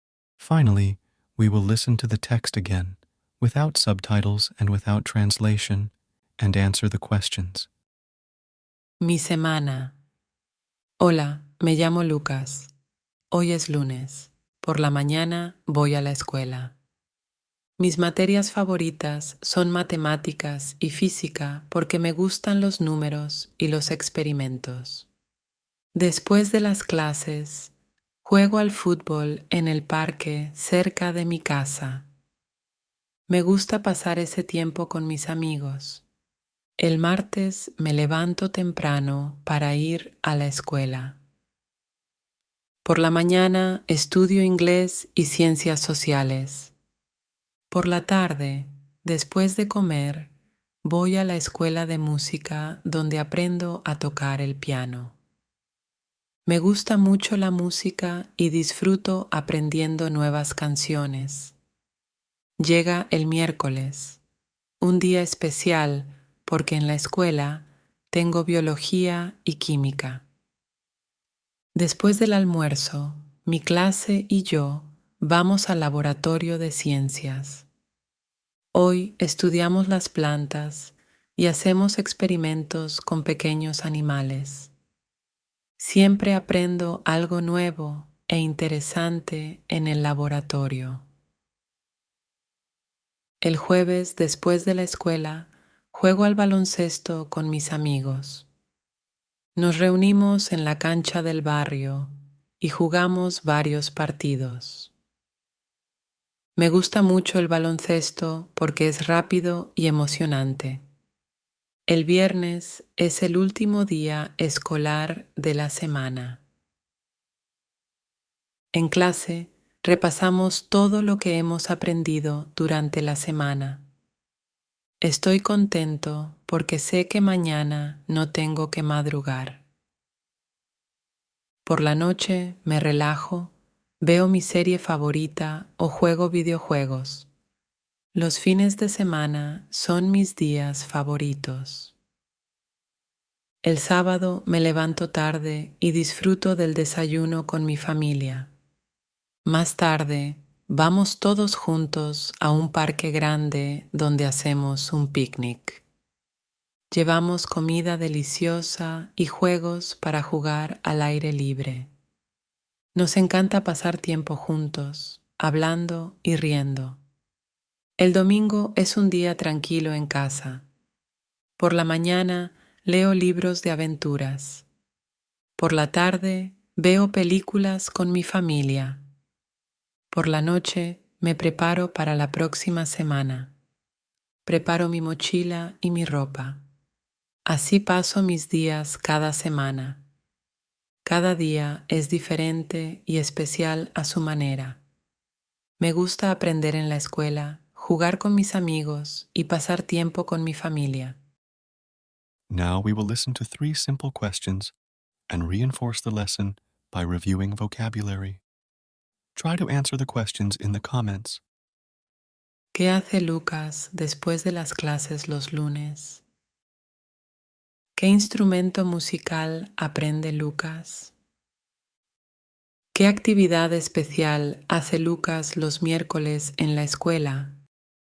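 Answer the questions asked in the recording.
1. Juega al fútbol en el parque cerca de su casa
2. El piano
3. Va al laboratorio de ciencias con su clase: estudian las plantas y hacen experimentos con pequeños animales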